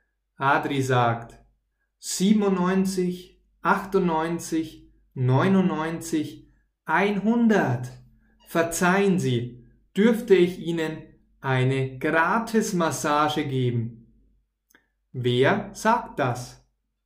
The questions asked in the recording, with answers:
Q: Wer sagt das?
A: Adri. Adri sagt das.